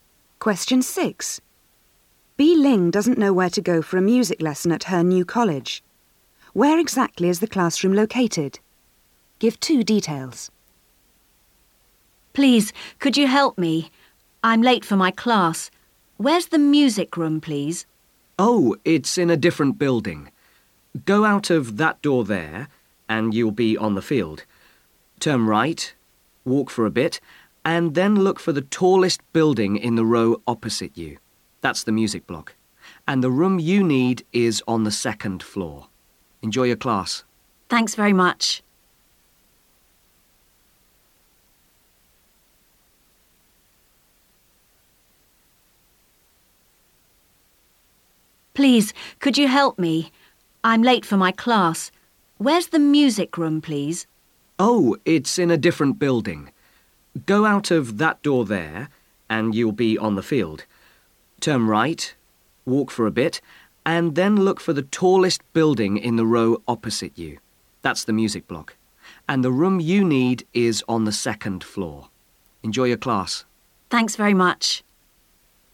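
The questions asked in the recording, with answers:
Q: Where exactly is the classroom located?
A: In the tallest building (the music block) opposite, on the second floor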